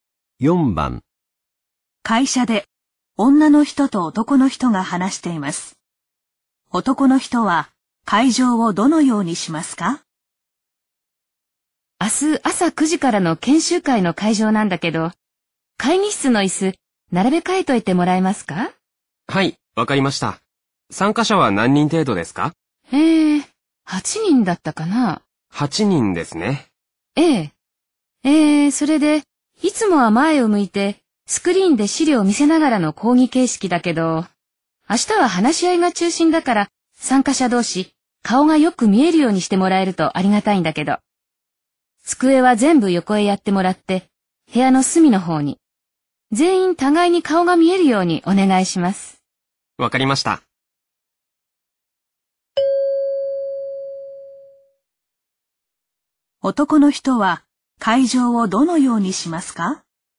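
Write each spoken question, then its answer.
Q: 男の人は会場をどのようにしますか?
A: 机を全部横へやって、部屋の隅に椅子を全員が互いに顔が見えるように並べる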